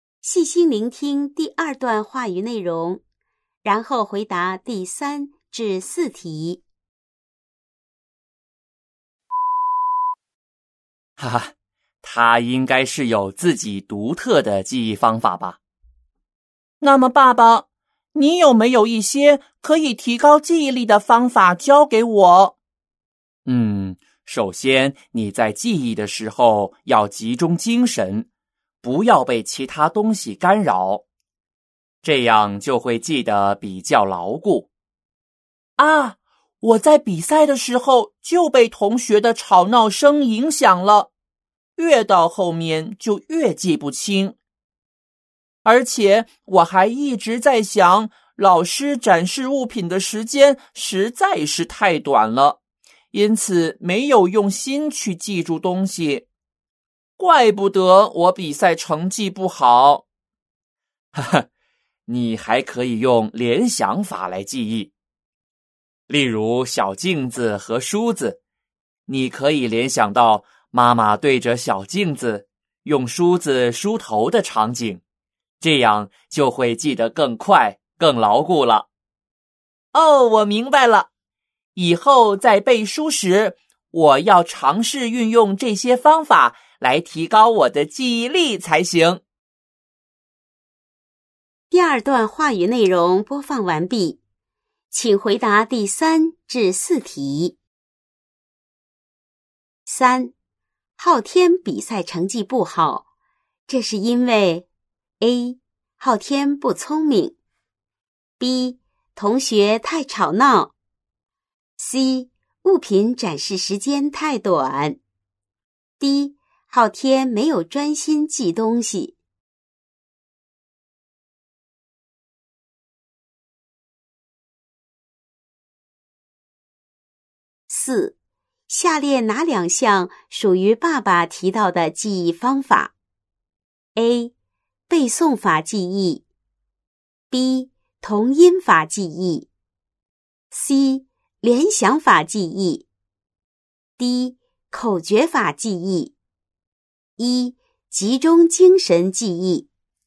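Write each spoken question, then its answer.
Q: 下列哪两项属于爸爸提到的记忆方法?A. 背诵法记忆,B. 同音法记忆,C. 联想法记忆,D. 口诀法记忆,E. 集中精神记忆。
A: C: 联想法记忆; E: 集中精神记忆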